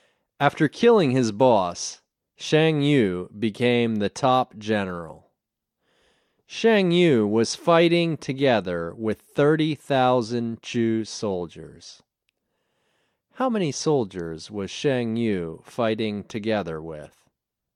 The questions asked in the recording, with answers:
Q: How many soldiers was Shang Yu fighting together with?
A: Shang Yu was fighting together with 30,000 Chu soldiers.